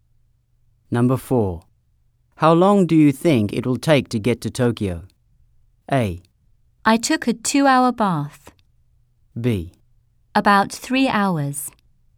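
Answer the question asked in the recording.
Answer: B: About 3 hours.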